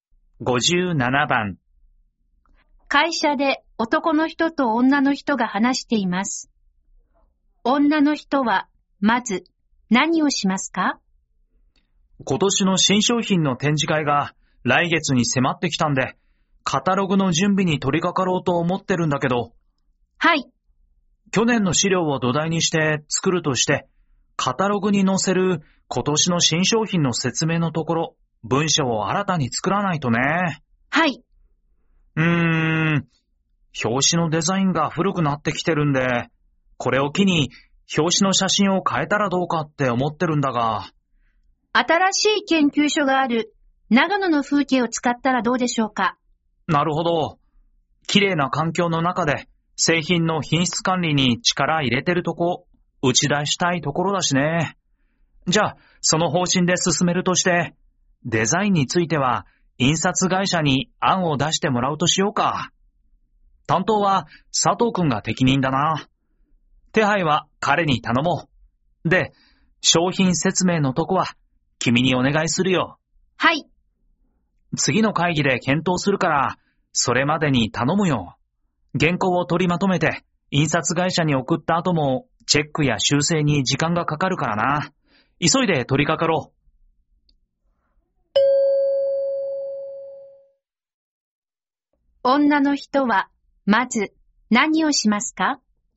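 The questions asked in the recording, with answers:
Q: 女の人はまず何をしますか?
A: 今年の新商品の説明文を作る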